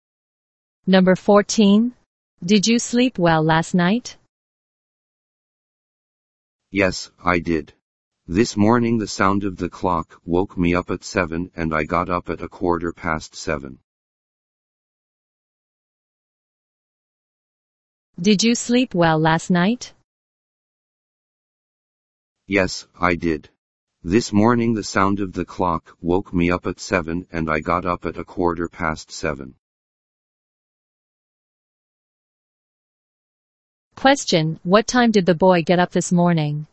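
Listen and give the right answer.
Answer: At 7:15.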